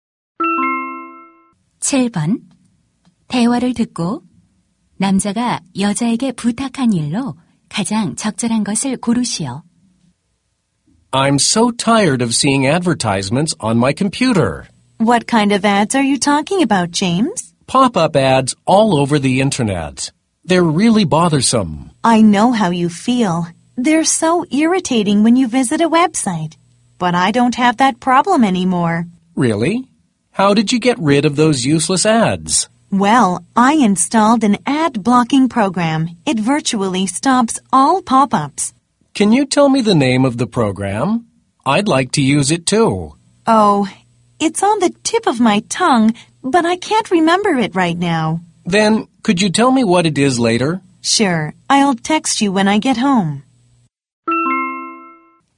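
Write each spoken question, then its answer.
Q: 대화를 듣고 남자가 여자에게 부탁한 일로 가장 적절한 것을 고르시오.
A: 광고 차단 프로그램 이름 알려주기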